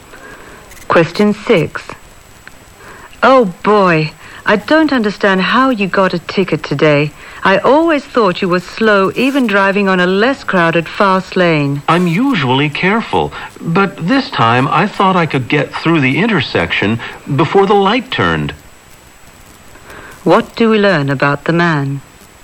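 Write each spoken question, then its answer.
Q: What do we learn about the man?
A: He got a ticket for trying to get through the intersection before the light changed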